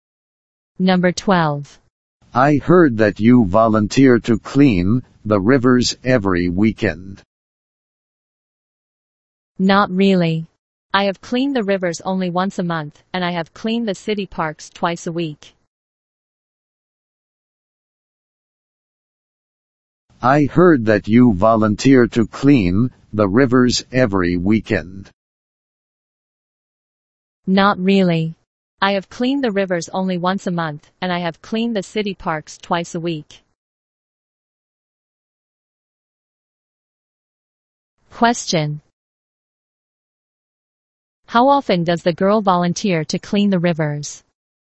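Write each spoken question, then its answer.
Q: How often does the girl volunteer to clean the rivers?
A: Once a month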